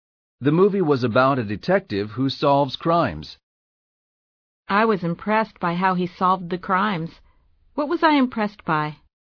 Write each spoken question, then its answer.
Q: What was I impressed by?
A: You were impressed by how he solved the crimes.